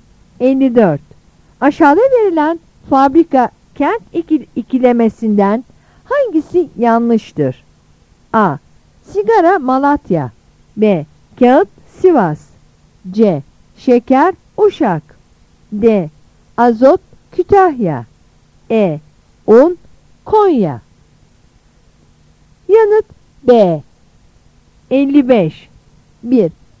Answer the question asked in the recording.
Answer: Yanıt B.